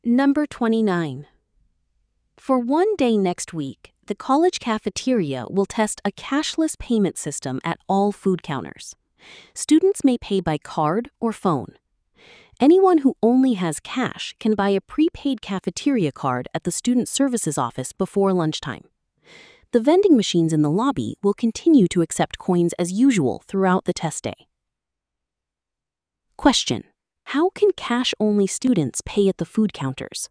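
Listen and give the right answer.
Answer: By buying a prepaid cafeteria card at the student services office before lunchtime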